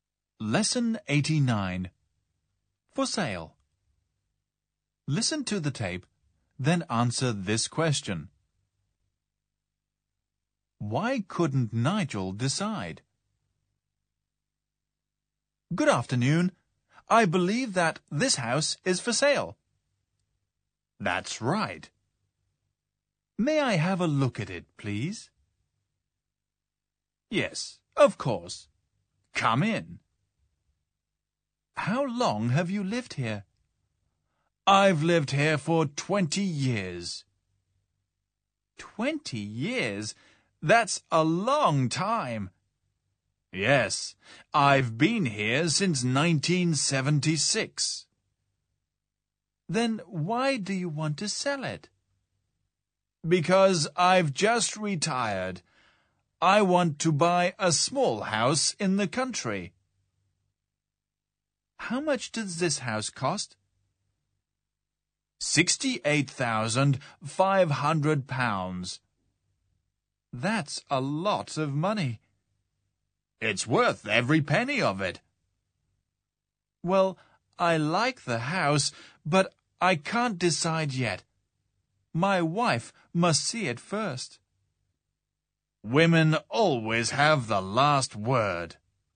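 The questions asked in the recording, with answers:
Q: Why couldn't Nigel decide?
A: Because his wife must see the house first.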